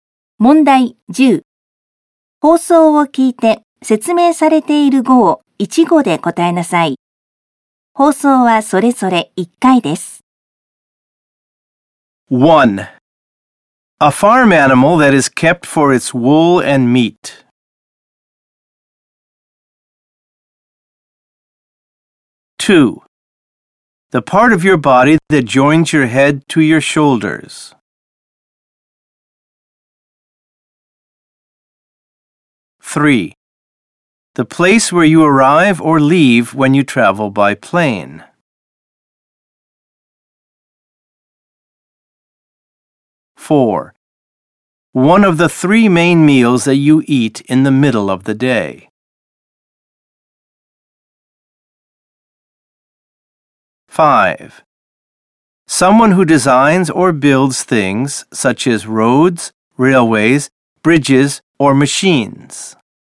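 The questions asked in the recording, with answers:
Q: A farm animal that is kept for its wool and meat.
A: sheep

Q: The part of your body that joins your head to your shoulders.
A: neck

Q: The place where you arrive or leave when you travel by plane.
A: airport

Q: One of the three main meals that you eat in the middle of the day.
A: lunch

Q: Someone who designs or builds things such as roads, railways, bridges, or machines.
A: engineer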